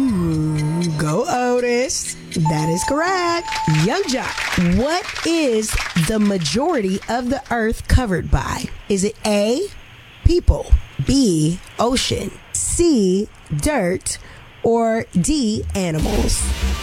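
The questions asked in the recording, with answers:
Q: what is the majority of the earth covered by?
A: B: ocean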